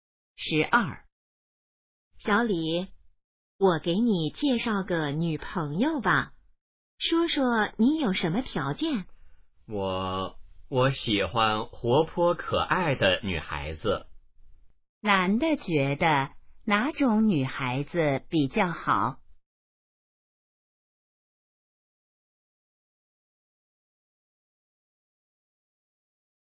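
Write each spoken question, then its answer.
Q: 男的觉得哪种女孩子比较好?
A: 活泼可爱的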